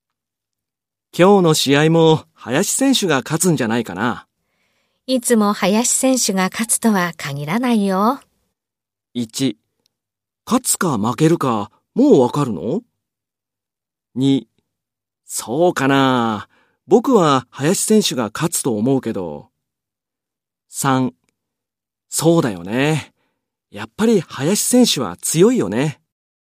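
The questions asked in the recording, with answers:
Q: いつも林選手が勝つとは限らないよ。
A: 3: そうかな。僕は林選手が勝つと思うけど。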